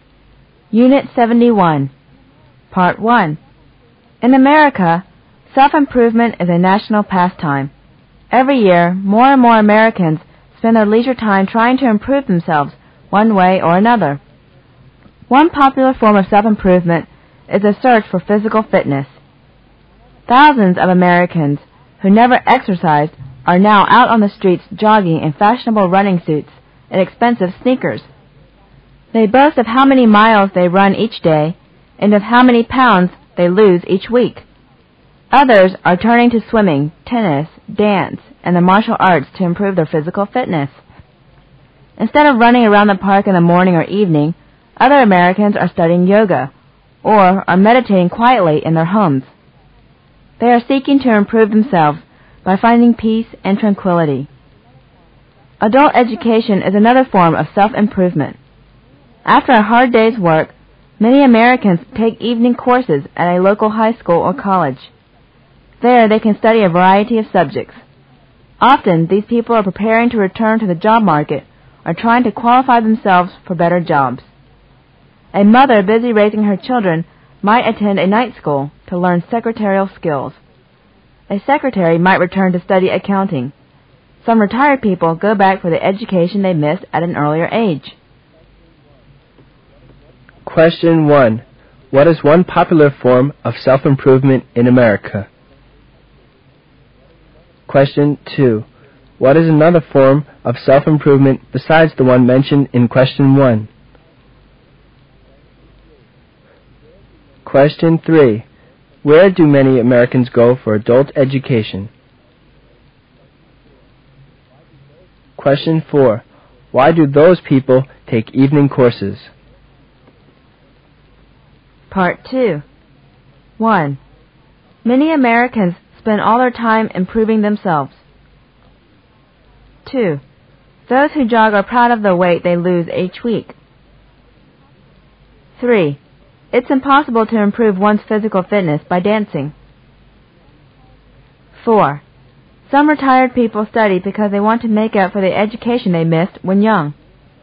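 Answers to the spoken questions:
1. A search for physical fitness
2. Adult education
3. A local high school or college
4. To return to the job market or qualify for better jobs
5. False
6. True
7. False
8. True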